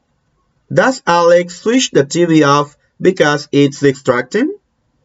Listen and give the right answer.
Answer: No, no. Alex doesn't switch the TV off.